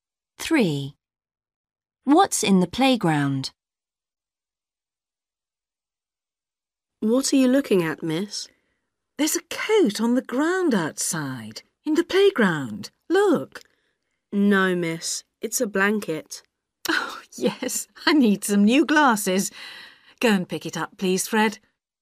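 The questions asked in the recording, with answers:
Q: What's in the playground?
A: a blanket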